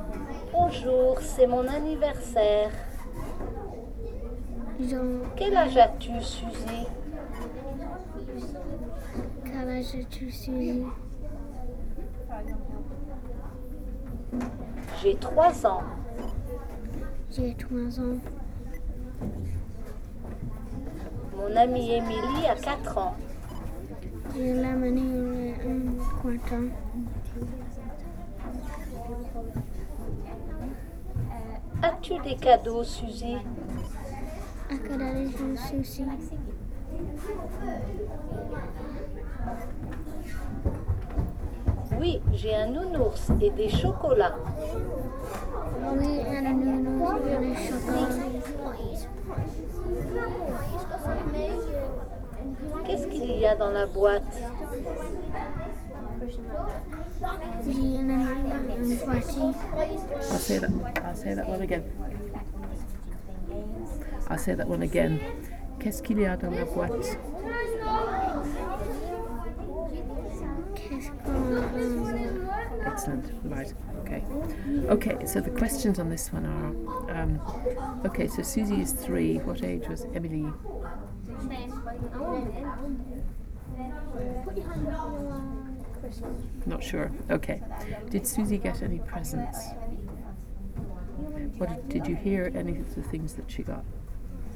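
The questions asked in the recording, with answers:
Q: Did Susie get any presents?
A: Yes

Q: What did you hear any of the things that she got?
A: A teddy bear and chocolates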